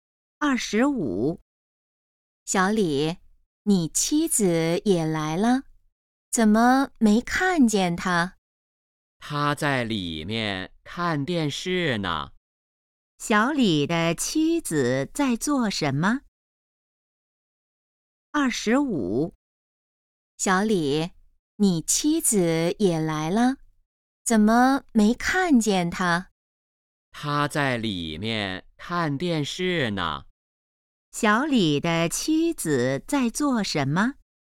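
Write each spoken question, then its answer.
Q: 小李的妻子在做什么?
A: 看电视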